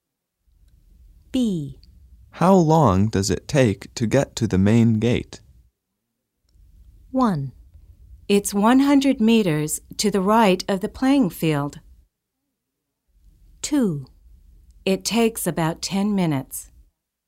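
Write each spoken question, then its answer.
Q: How long does it take to get to the main gate?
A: 2: It takes about 10 minutes.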